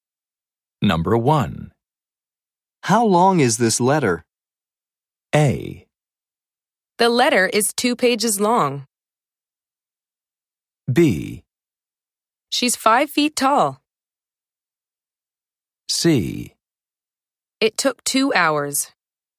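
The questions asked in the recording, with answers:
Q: How long is this letter?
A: A: The letter is 2 pages long.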